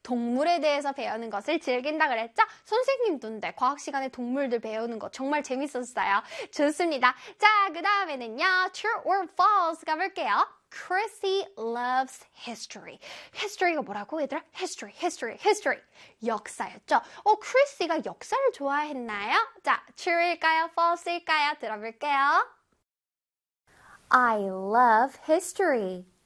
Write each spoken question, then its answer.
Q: Chrissy loves history.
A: 그래서 정답은 true가 되겠습니다.